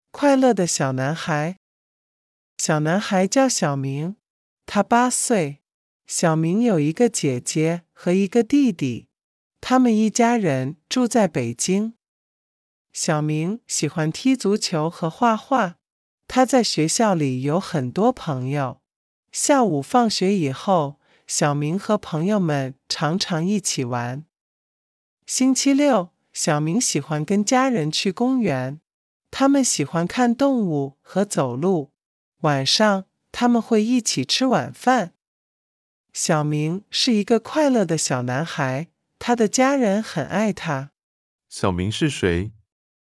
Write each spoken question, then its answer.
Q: 小明是谁?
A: 小明是个小男孩,他八岁。